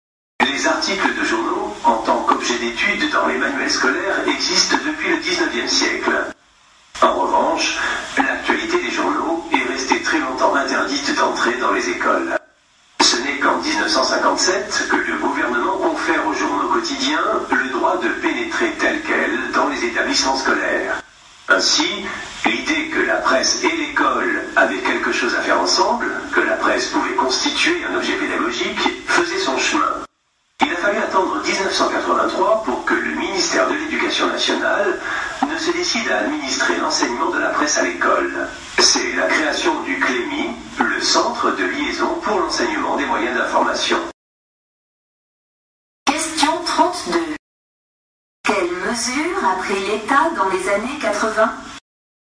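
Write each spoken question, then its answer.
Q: Quelles mesures a pris l'État dans les années 80 ?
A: Il a créé le CLEMI pour organiser l'enseignement de la presse à l'école (1983).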